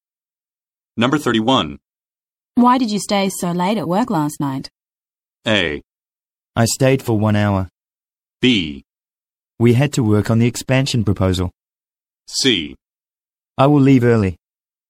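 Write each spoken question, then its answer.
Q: Why did you stay so late at work last night?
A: B: We had to work on the expansion proposal.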